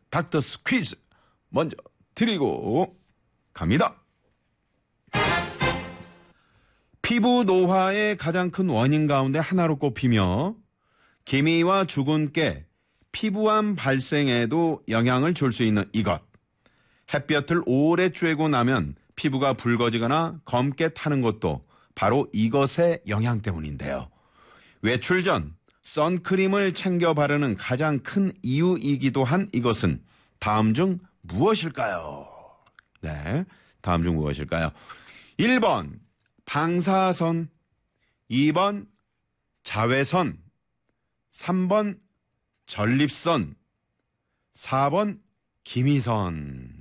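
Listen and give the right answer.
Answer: 2번: 자외선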